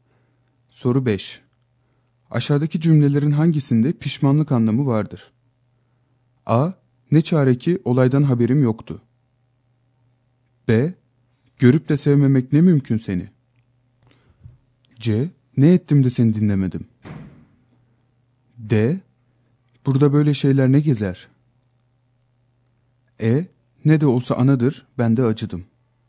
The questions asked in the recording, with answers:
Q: Aşağıdaki cümlelerin hangisinde pişmanlık anlamı vardır?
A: Doğru yanıt C şıkkı.